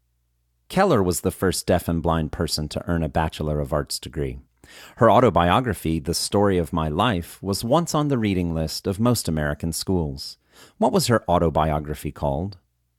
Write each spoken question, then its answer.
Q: What was her autobiography called?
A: Her autobiography was called The Story of My Life.